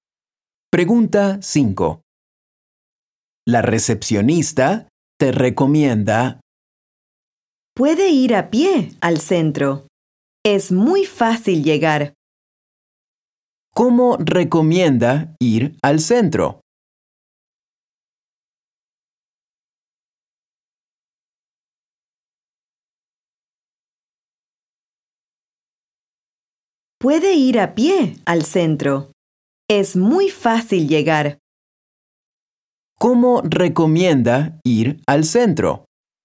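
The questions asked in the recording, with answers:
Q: ¿Cómo recomienda ir al centro?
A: a pie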